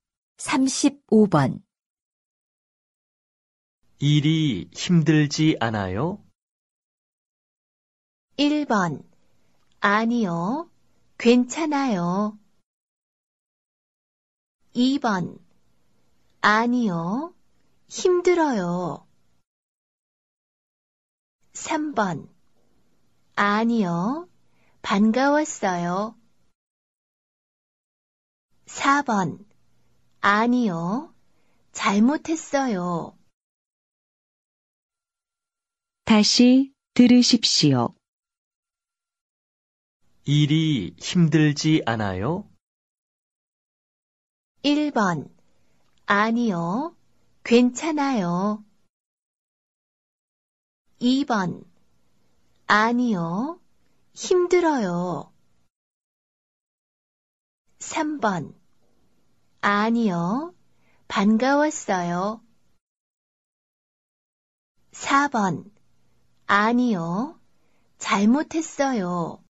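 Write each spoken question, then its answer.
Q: 일이 힘들지 않아요?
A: 1: 아니요. 괜찮아요.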